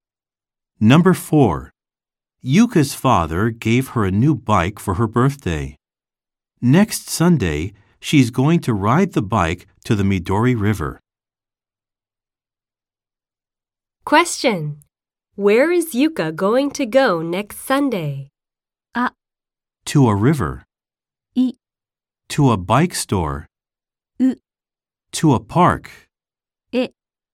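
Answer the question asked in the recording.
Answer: A: To a river.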